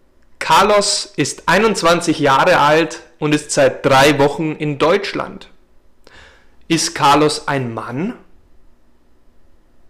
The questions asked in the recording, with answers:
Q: Ist Carlos ein Mann?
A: Ja, Carlos ist ein Mann.